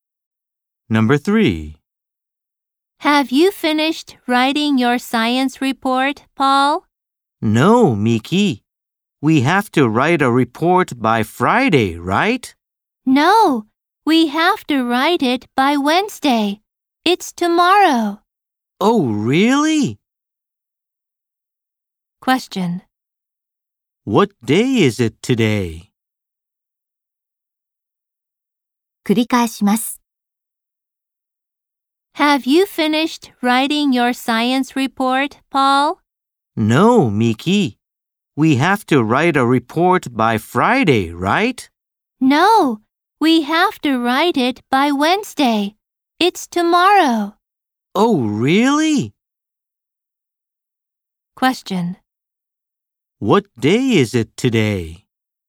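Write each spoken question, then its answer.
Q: What day is it today?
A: Tuesday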